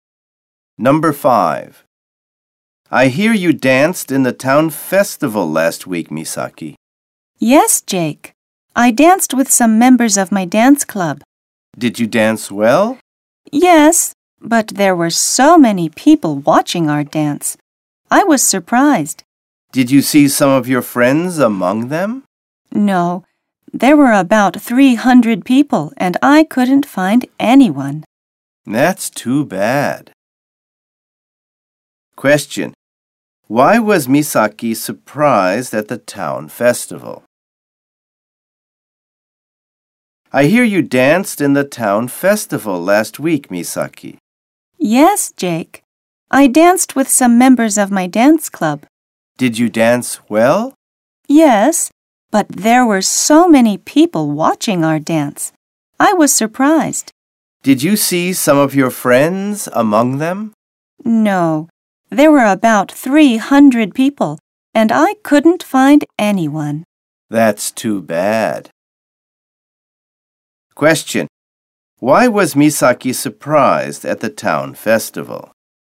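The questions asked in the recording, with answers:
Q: Why was Misaki surprised at the town festival?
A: Because so many people (about 300) were watching their dance.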